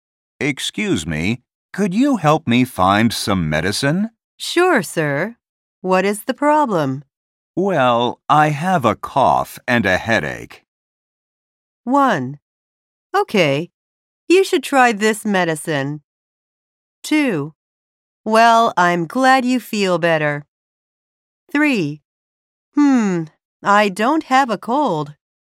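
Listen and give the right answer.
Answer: 1: Okay, you should try this medicine.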